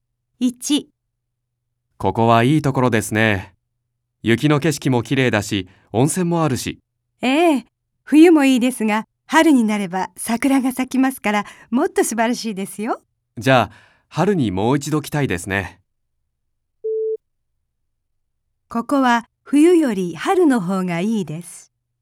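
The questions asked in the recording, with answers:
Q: ここは冬より春の方がいいです。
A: ○(正しい)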